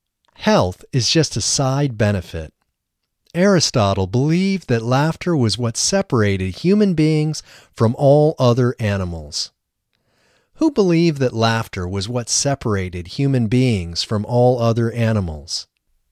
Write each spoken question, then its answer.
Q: Who believed that laughter was what separated human beings from all other animals?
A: Aristotle believed that laughter was what separated human beings from all other animals.